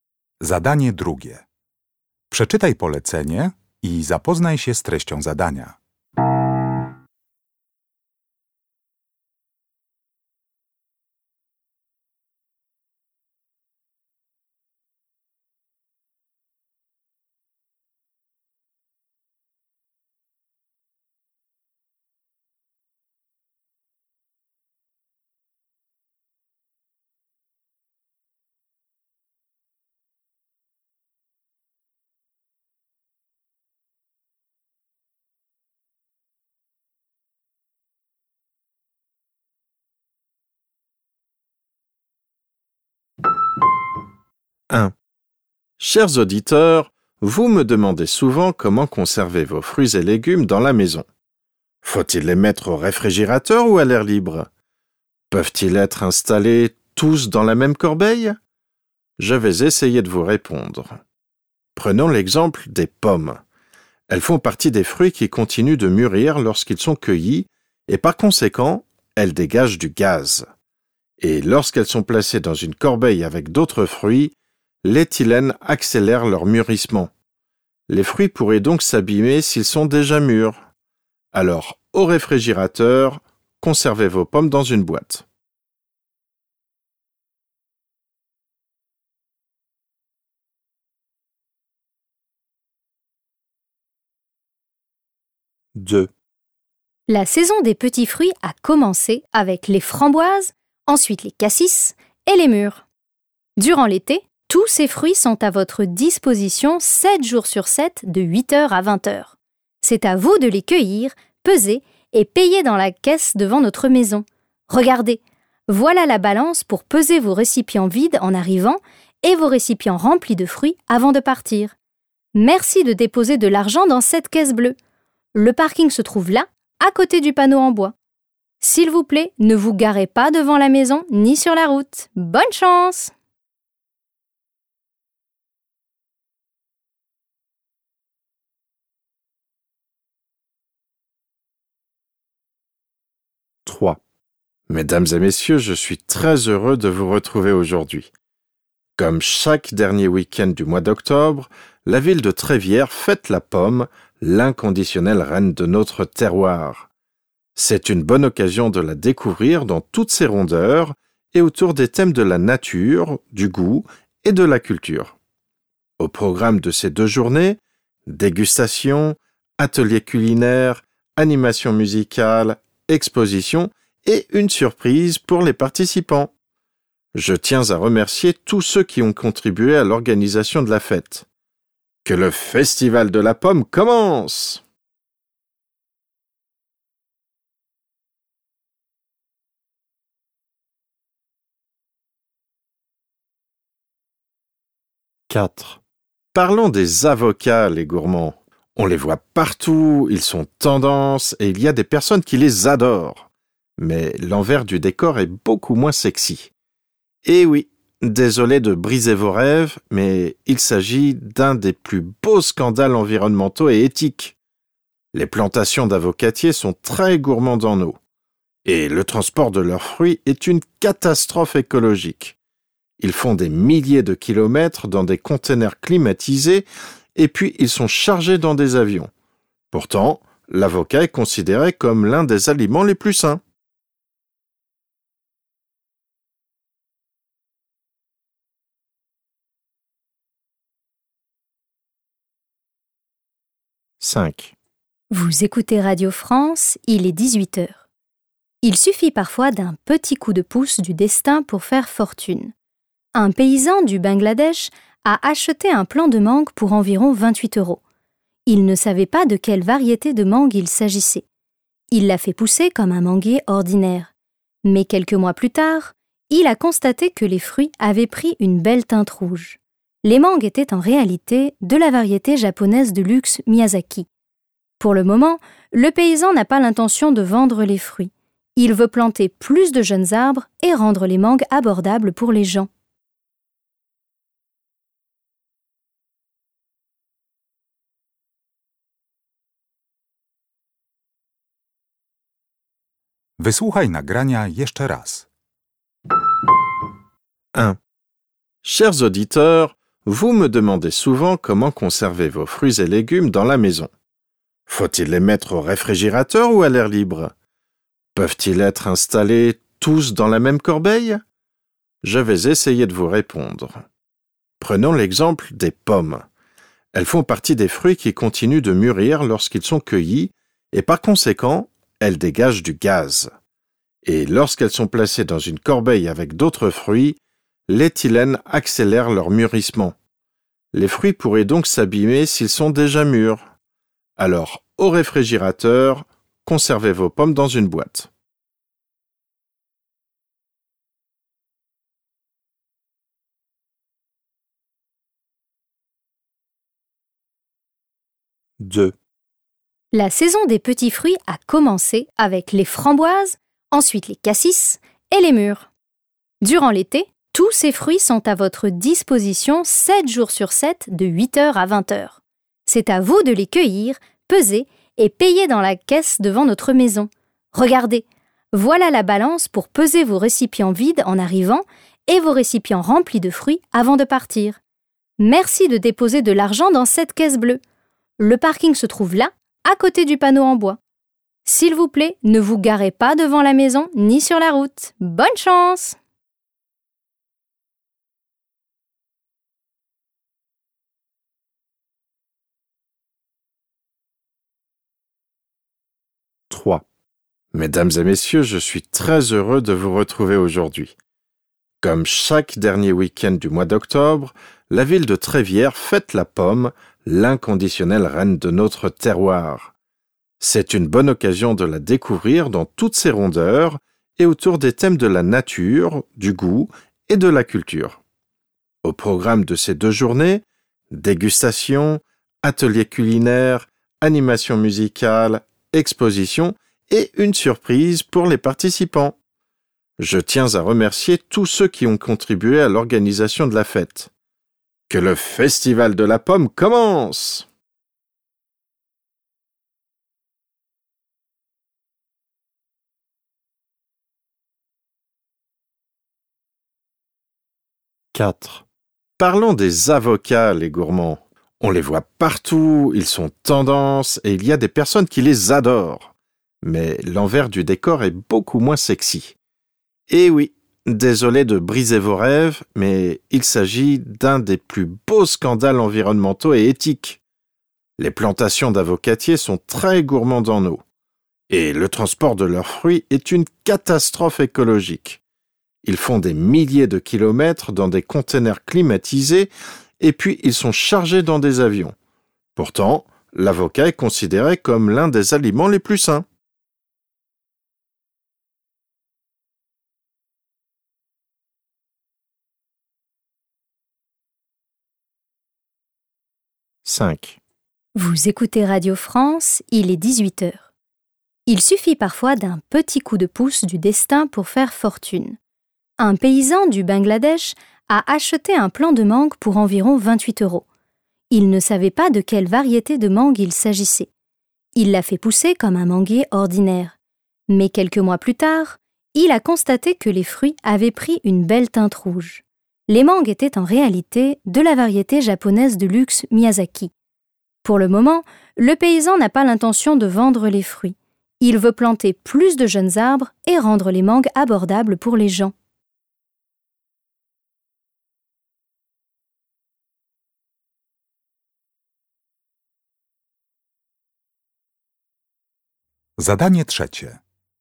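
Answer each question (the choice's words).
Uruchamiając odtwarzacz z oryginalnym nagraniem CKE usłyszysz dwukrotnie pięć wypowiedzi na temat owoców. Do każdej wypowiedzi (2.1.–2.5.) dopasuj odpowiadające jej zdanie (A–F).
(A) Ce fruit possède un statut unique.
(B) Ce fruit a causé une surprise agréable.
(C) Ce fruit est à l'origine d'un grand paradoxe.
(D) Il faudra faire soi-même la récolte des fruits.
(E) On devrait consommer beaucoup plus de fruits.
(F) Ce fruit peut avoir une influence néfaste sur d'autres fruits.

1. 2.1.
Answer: Ce fruit peut avoir une influence néfaste sur d'autres fruits.

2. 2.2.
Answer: Il faudra faire soi-même la récolte des fruits.

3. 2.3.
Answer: Ce fruit possède un statut unique.

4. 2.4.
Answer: Ce fruit est à l'origine d'un grand paradoxe.

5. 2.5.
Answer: Ce fruit a causé une surprise agréable.

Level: Poziom: rozszerzony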